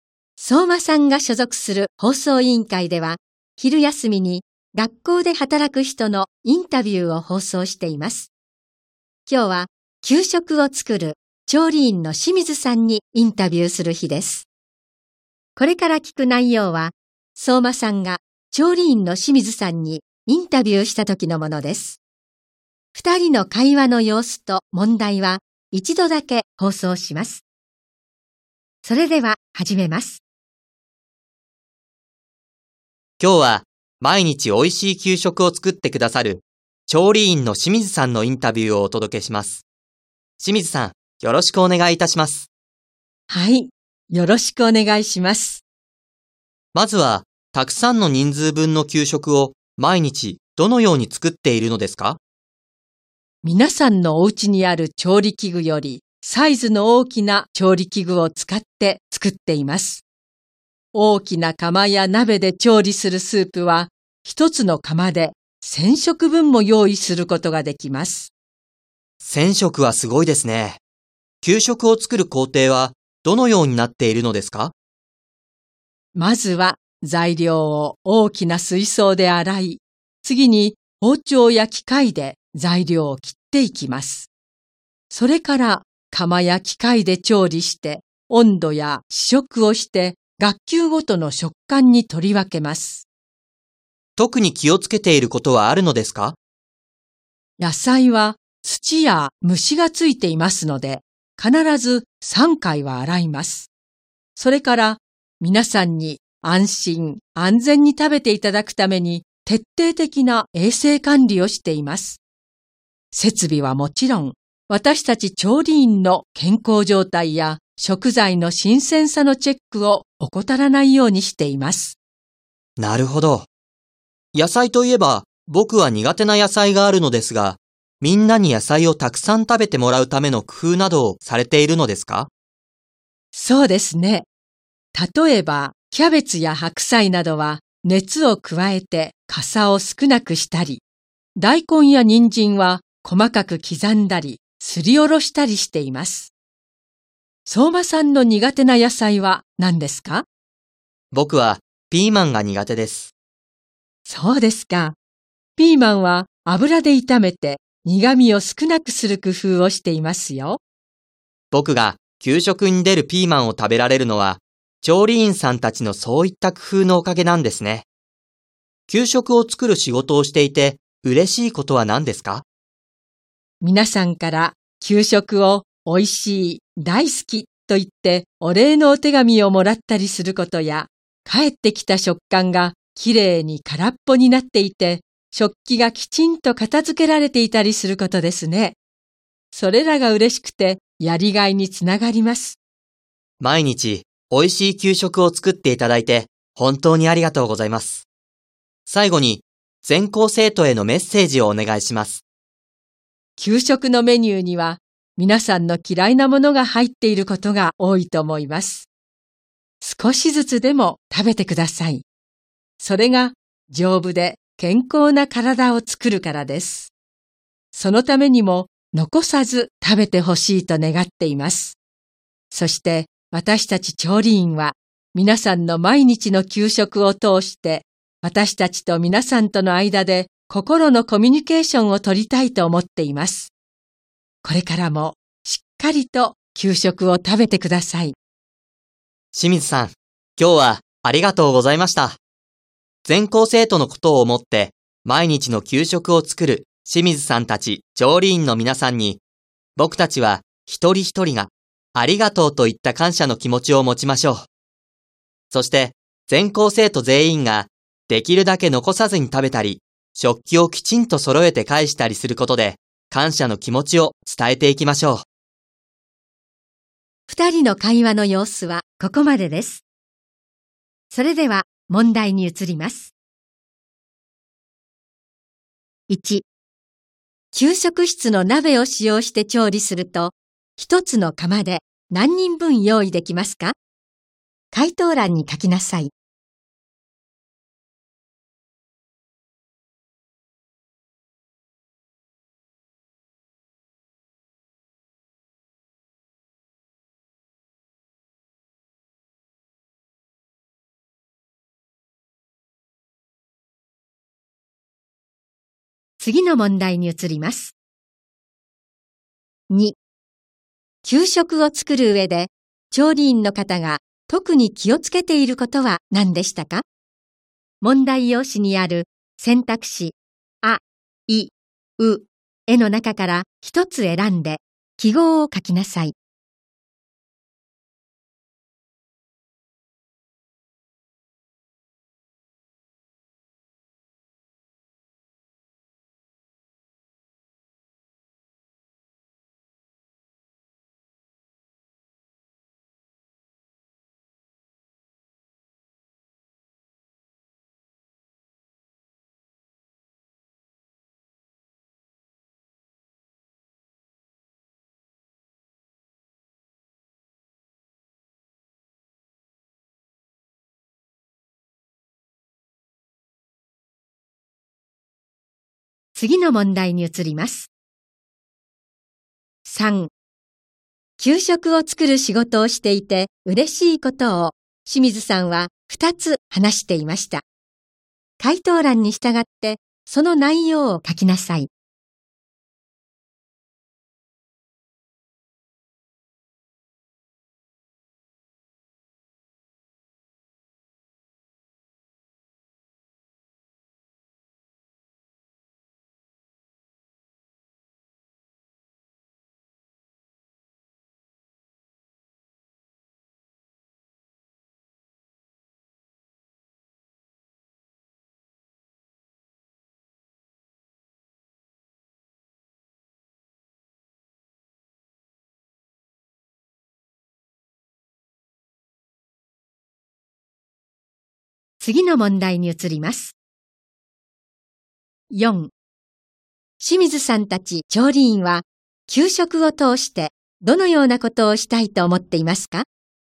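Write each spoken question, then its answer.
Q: 給食室の鍋を使用して調理すると、一つの釜で何人分用意できますか?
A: 1000食分

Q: 給食を作る仕事をしていて嬉しいことを清水さんは2つ話していました。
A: 給食が美味しい、大好きとお礼の手紙をもらうこと;返ってきた食缶が空っぽで食器がきちんと片付けられていること

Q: 清水さんたち調理員は、給食を通してどのようなことをしたいと思っていますか?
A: 調理員と皆さんとの間で心のコミュニケーションを取りたい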